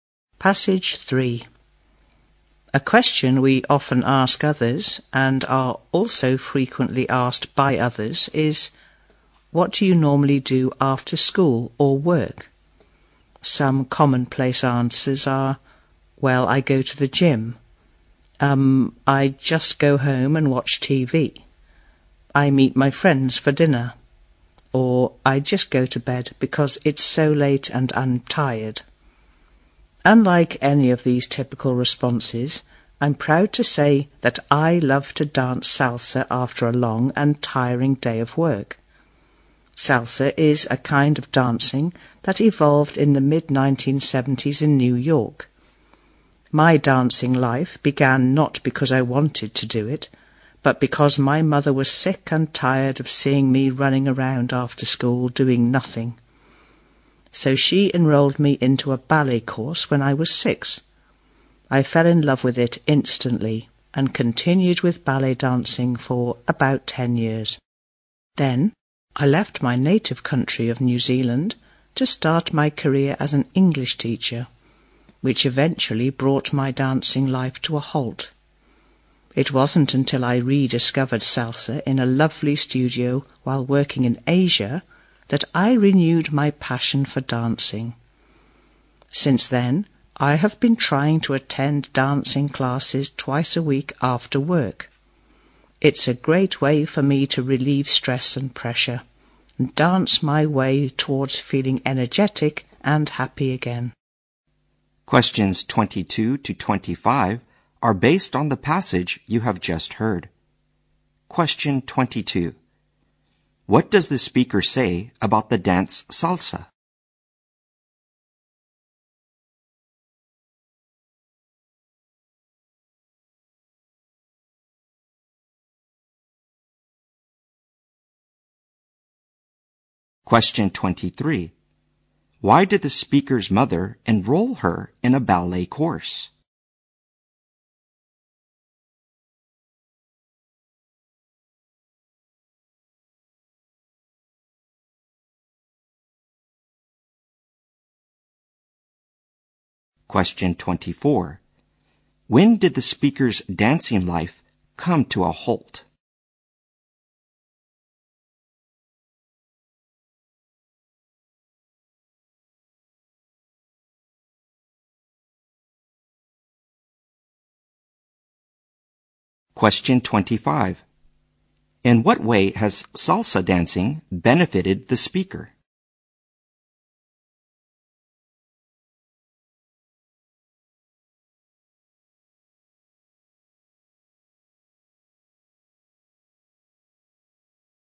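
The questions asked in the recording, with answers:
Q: What does the speaker say about the dance salsa?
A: It evolved in the mid-1970s in New York

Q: Why did the speaker's mother enroll her in a ballet course?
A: She was tired of seeing her run around after school doing nothing

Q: When did the speaker's dancing life come to a halt?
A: When she left New Zealand to work as an English teacher

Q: In what way has salsa dancing benefited the speaker?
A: It relieves her stress and makes her energetic and happy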